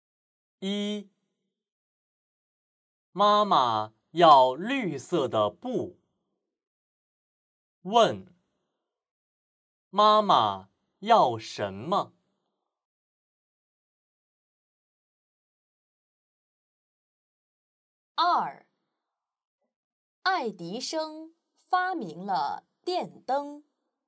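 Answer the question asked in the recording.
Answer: 绿色的布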